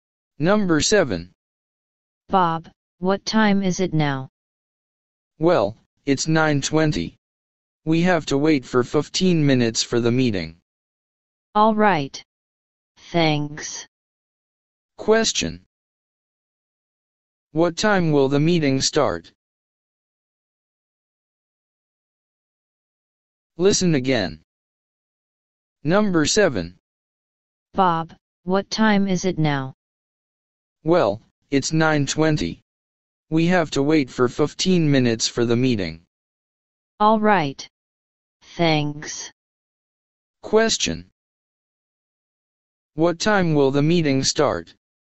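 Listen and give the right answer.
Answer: At 9:35.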